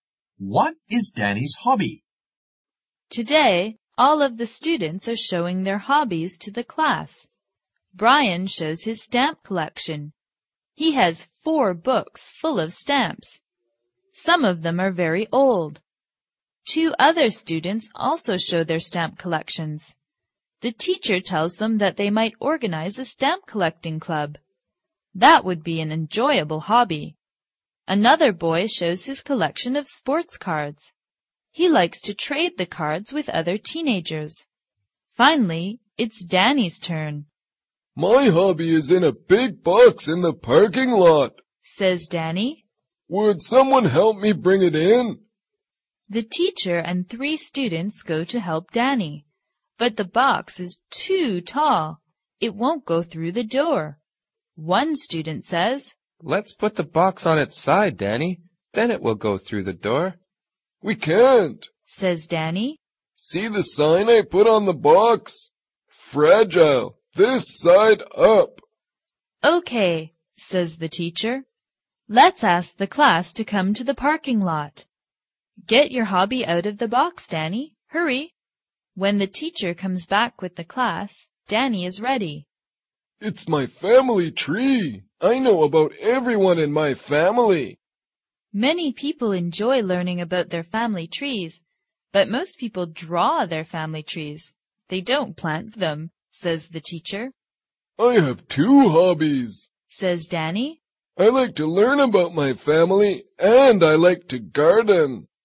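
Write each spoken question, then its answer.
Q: What is Danny's hobby?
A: Learning about his family (his family tree) and gardening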